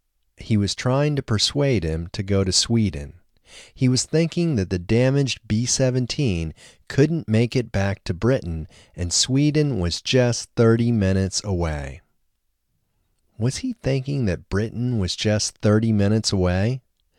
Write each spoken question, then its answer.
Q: Was he thinking that Britain was just 30 minutes away?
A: No, he wasn't thinking that Britain was just 30 minutes away.